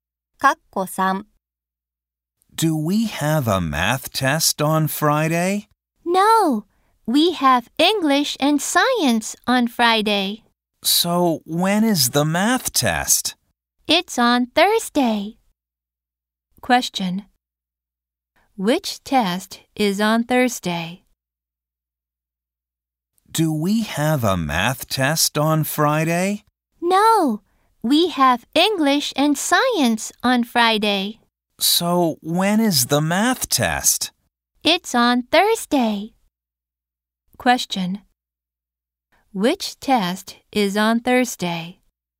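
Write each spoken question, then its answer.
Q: Which test is on Thursday?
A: The math test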